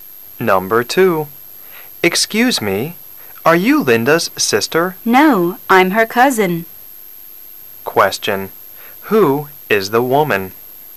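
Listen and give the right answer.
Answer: Linda's cousin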